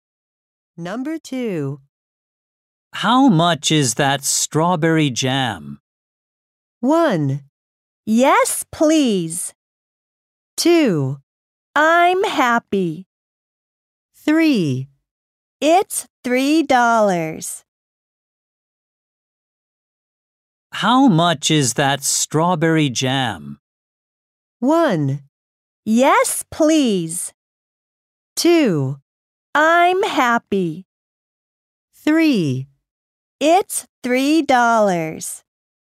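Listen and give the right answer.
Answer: 3: It's $3.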